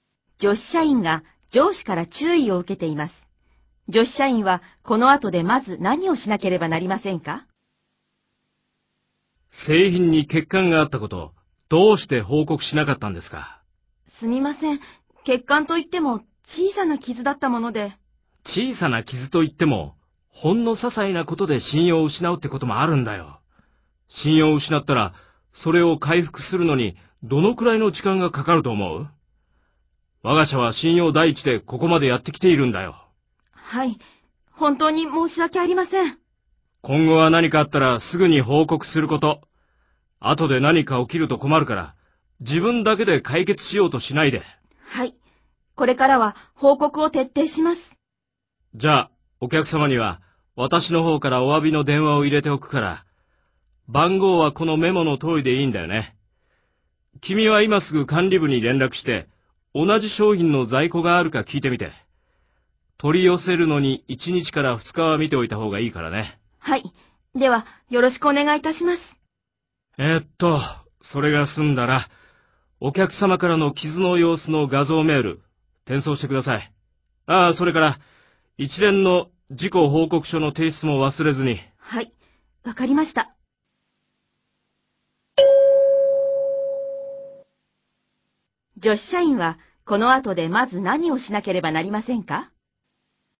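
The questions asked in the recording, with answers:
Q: 女子社員はこの後でまず何をしなければなりませんか?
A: 管理部に連絡して、同じ商品の在庫があるか聞く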